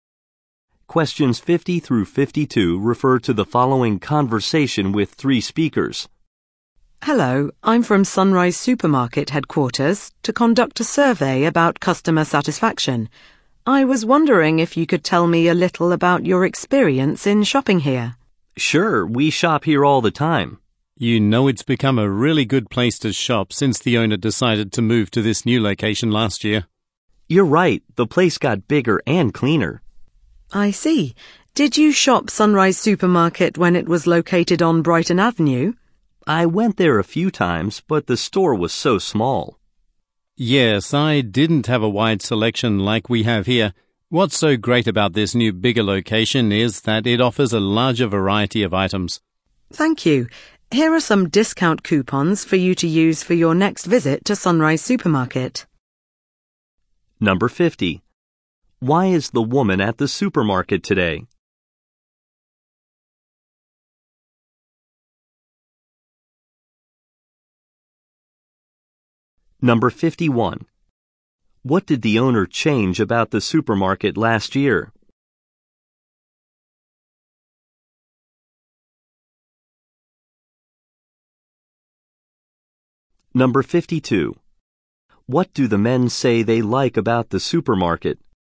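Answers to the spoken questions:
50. To conduct a customer satisfaction survey.
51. Its location.
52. Its larger variety of items.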